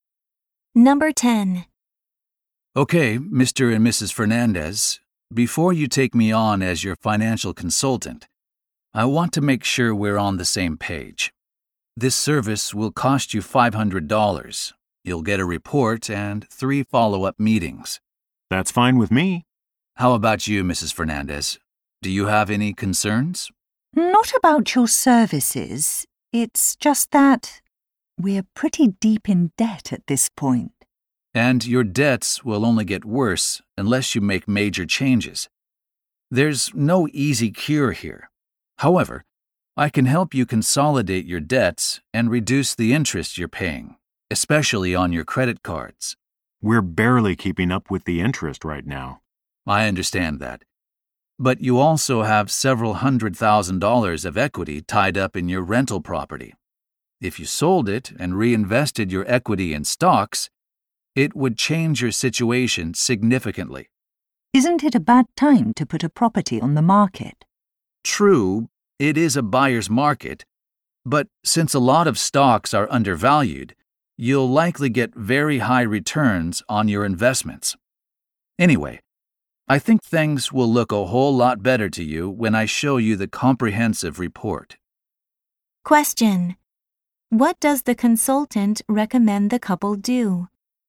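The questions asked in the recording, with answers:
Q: What does the consultant recommend the couple do?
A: Sell their rental property and invest the equity in stocks.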